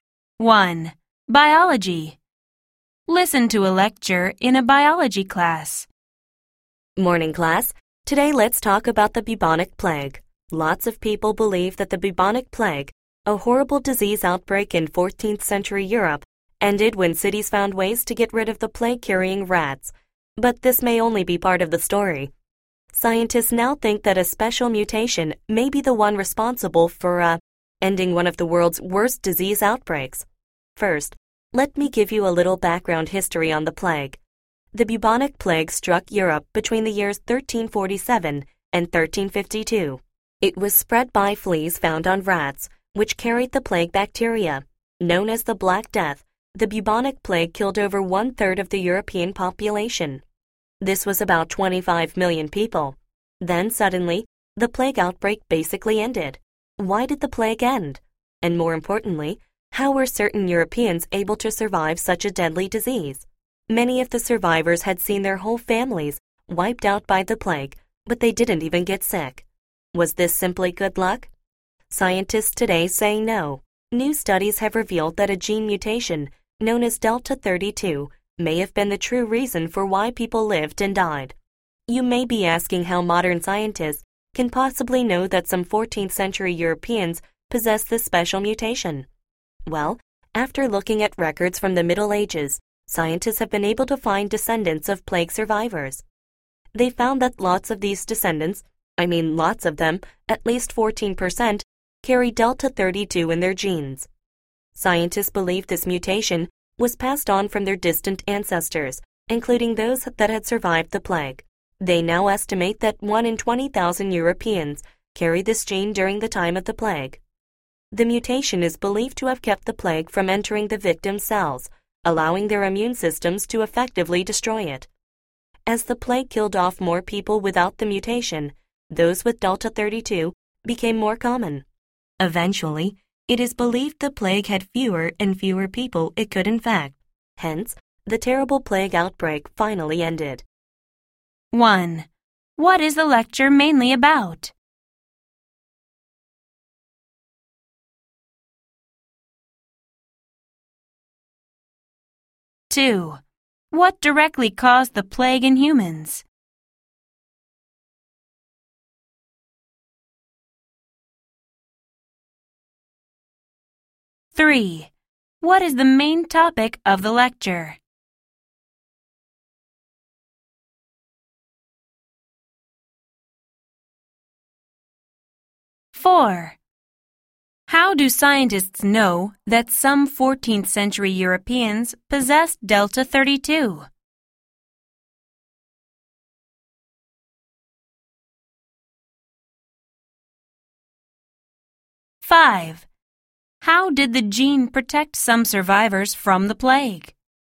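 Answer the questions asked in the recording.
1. How a gene mutation (Delta 32) may have ended the bubonic plague
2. Plague bacteria spread by fleas found on rats
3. The Delta 32 gene mutation's role in ending the bubonic plague
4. Descendants of plague survivors, found through Middle Ages records, carry Delta 32
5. It kept the plague from entering cells, so the immune system could destroy it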